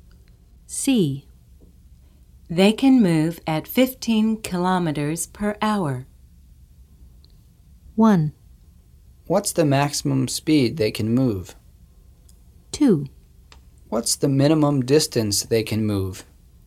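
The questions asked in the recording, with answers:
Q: They can move at 15 kilometers per hour.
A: 1: What's the maximum speed they can move?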